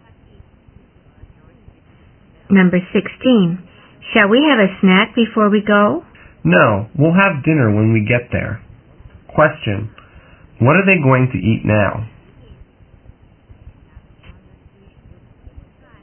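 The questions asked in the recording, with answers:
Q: What are they going to eat now?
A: Nothing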